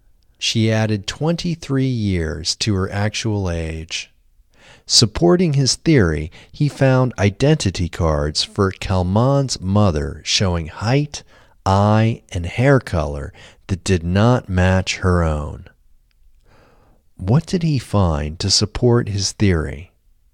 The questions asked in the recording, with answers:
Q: What did he find to support his theory?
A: To support his theory, he found identity cards for Kalman's mother showing height, eye, and hair color that did not match her own.